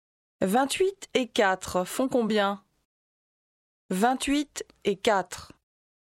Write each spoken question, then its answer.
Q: 28 et 4 font combien?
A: 32.